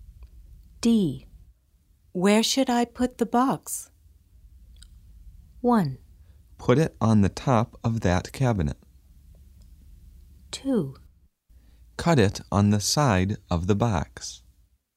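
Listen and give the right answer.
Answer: 1: Put it on the top of that cabinet.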